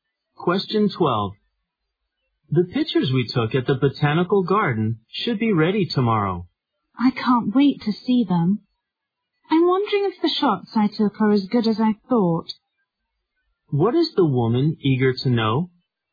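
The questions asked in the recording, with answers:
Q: What is the woman eager to know?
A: Whether her photos are as good as she thought.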